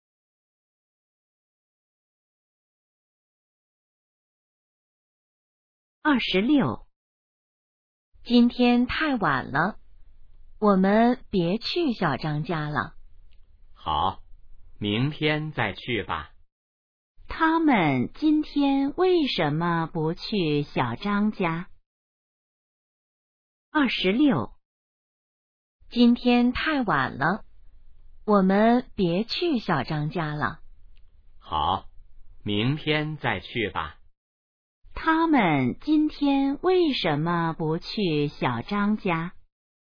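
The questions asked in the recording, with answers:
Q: 他们今天为什么不去小张家?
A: 今天太晚了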